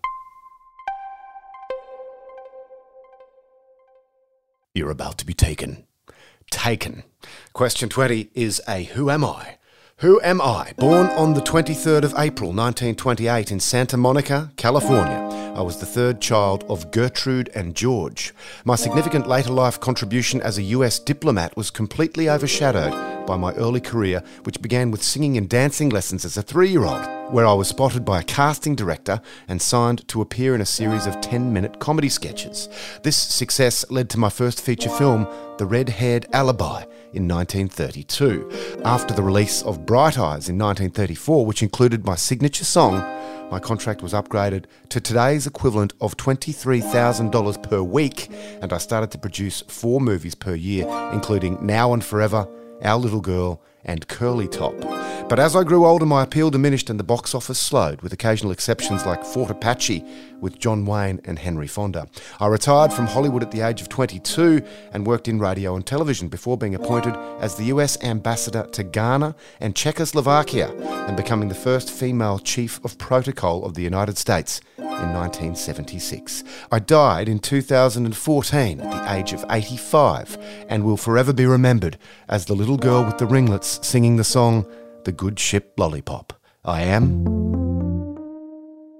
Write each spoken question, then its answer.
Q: Who am I?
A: I am Shirley Temple.